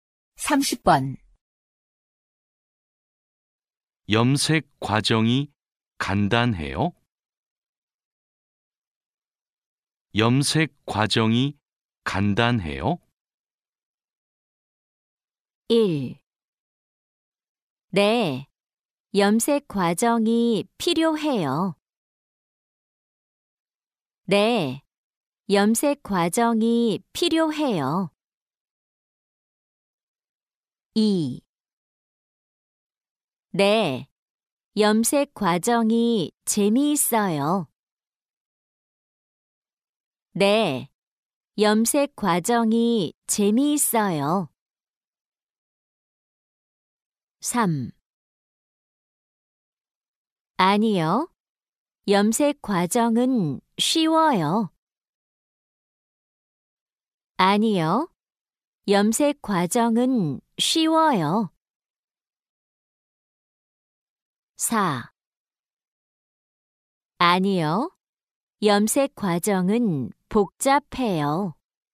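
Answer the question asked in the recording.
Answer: 4: 아니요, 염색 과정은 복잡해요.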